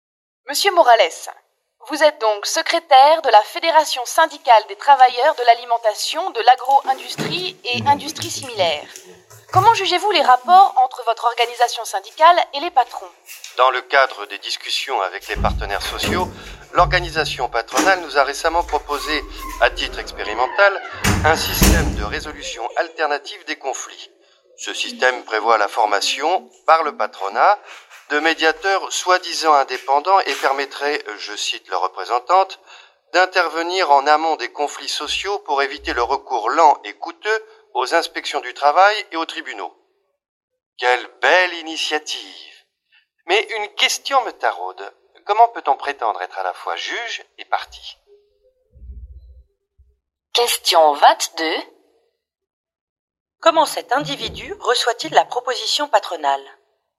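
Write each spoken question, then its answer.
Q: Comment cet individu reçoit-il la proposition patronale ?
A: Avec méfiance, de façon ironique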